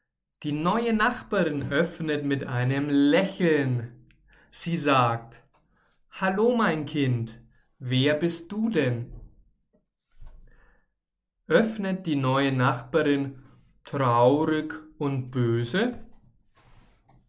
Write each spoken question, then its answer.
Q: Öffnet die neue Nachbarin traurig und böse?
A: Nein, die neue Nachbarin öffnet nicht traurig und sie ist auch nicht böse, sondern sie öffnet mit einem Lächeln.